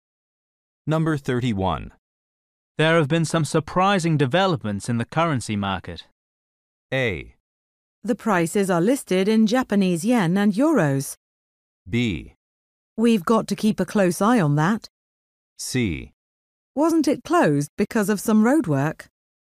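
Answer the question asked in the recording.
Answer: B: We've got to keep a close eye on that.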